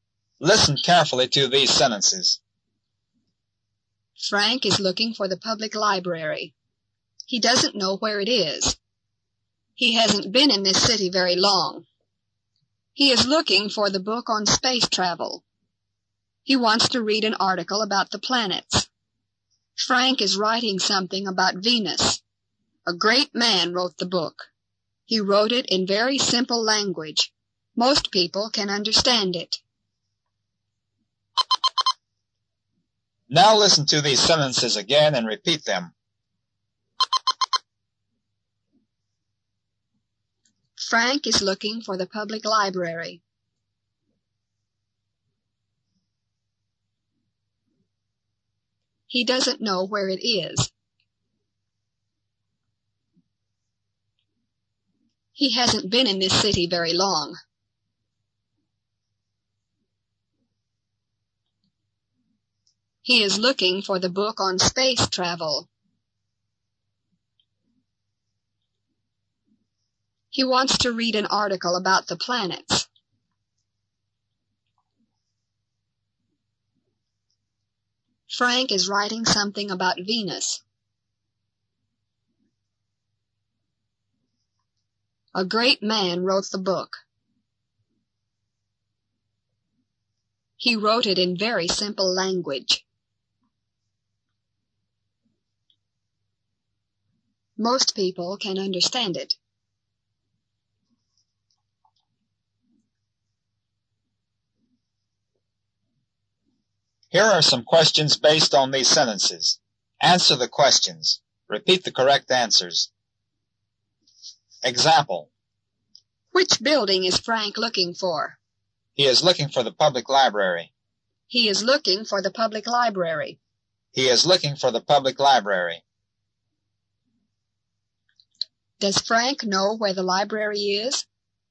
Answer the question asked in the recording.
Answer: No, he doesn't know where the library is.